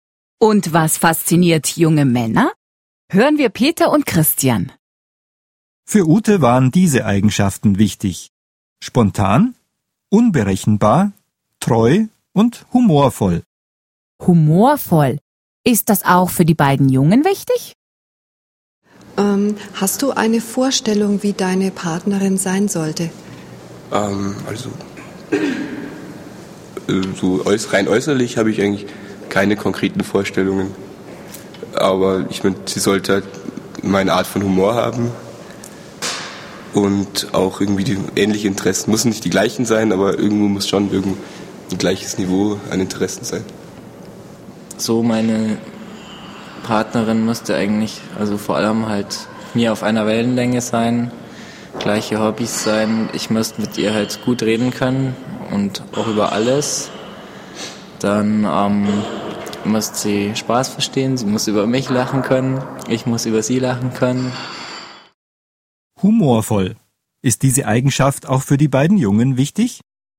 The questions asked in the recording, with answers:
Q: Humorvoll. Ist diese Eigenschaft auch für die beiden Jungen wichtig?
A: Ja, ihre Partnerin sollte humorvoll sein.